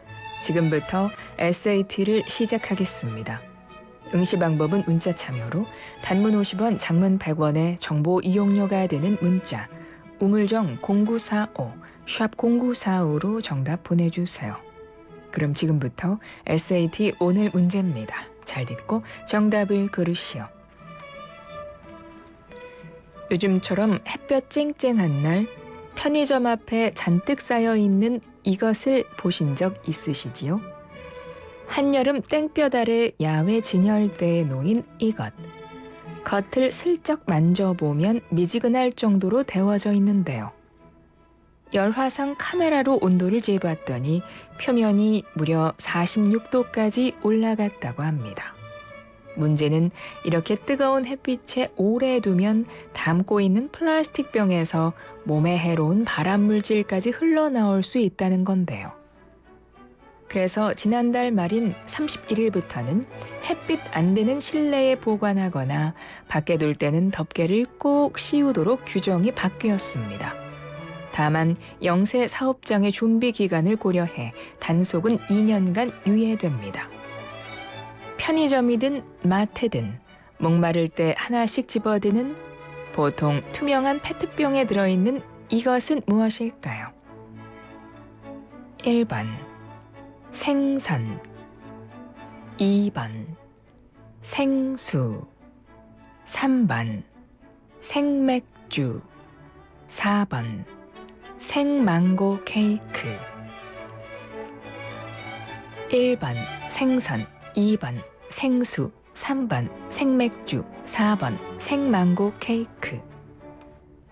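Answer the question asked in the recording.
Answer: 2: 생수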